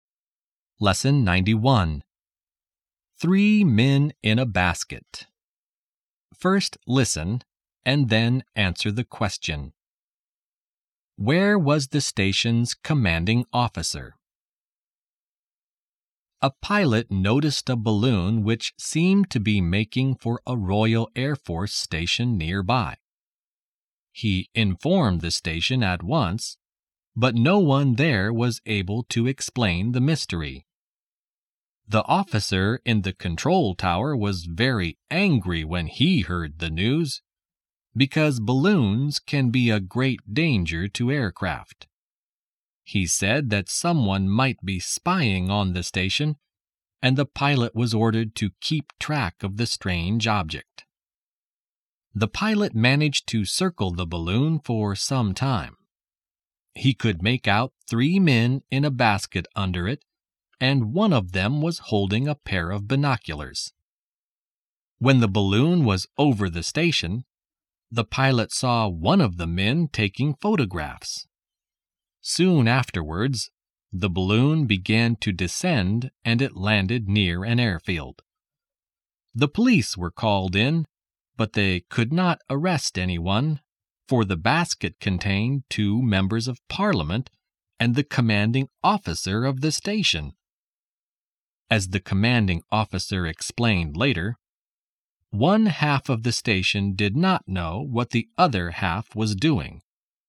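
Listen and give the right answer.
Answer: In the balloon's basket, with two members of parliament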